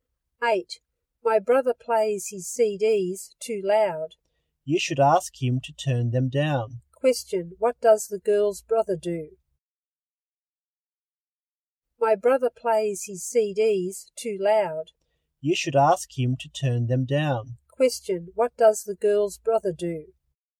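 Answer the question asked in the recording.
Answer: He plays his CDs too loud.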